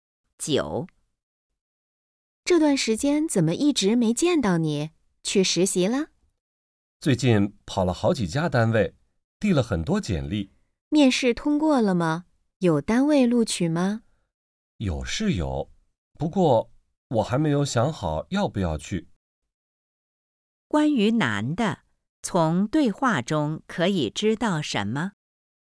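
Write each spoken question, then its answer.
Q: 关于男的,从对话中可以知道什么?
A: 有单位录取了,但他还没想好要不要去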